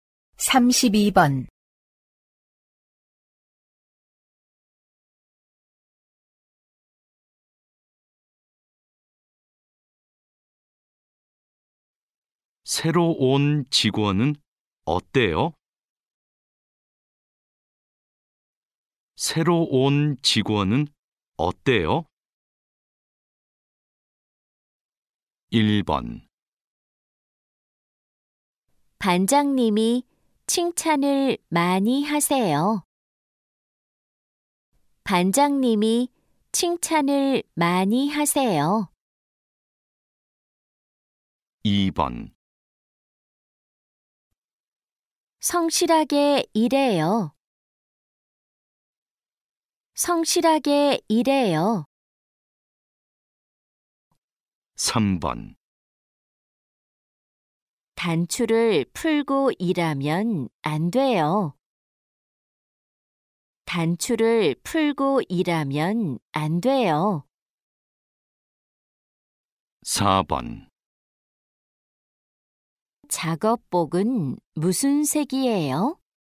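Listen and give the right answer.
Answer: 2: 성실하게 일해요.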